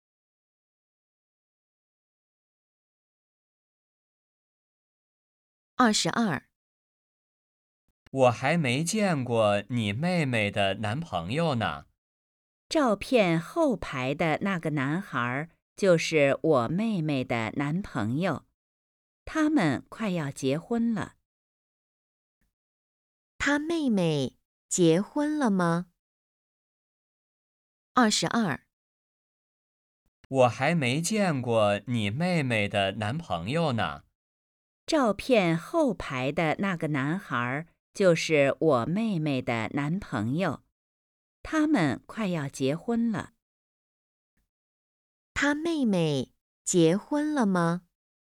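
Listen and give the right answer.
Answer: 没有,快要结婚了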